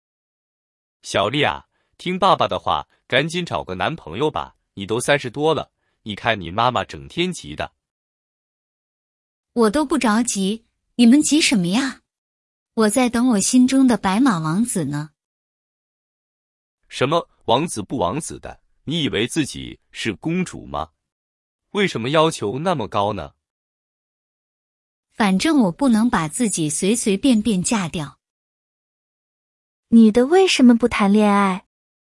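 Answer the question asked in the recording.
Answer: 她在等心中的白马王子,不想随随便便嫁掉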